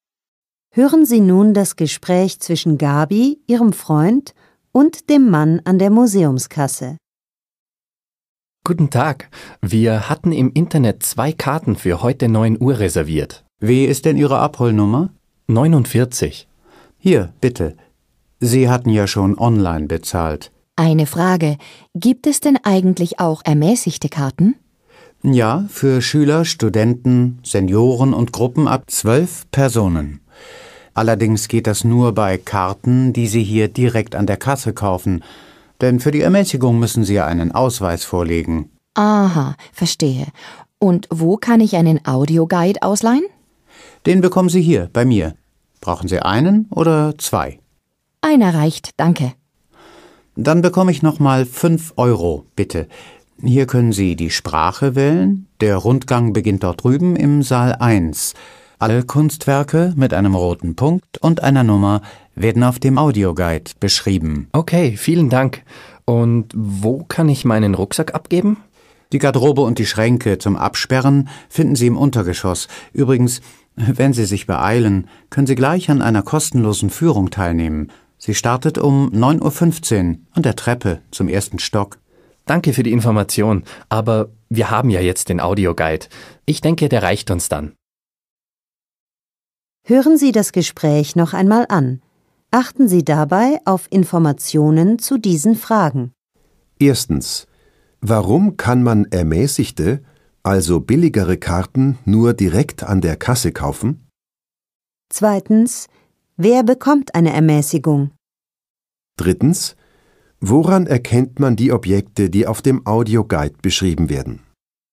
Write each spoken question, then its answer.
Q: Erstens, warum kann man ermäßigte, also billigere Karten nur direkt an der Kasse kaufen?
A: Weil man für die Ermäßigung einen Ausweis zeigen muss.

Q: Zweitens, wer bekommt eine Ermäßigung?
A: Schüler, Studenten, Senioren und Gruppen ab 12 Personen.

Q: Drittens, woran erkennt man die Objekte, die auf dem Audioguide beschrieben werden?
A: Sie sind mit einem roten Punkt und einer Nummer gekennzeichnet.